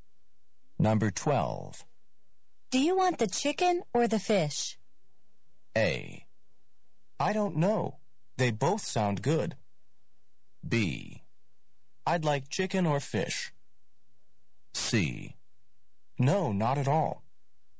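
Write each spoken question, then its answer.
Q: Do you want the chicken or the fish?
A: A: I don't know. They both sound good.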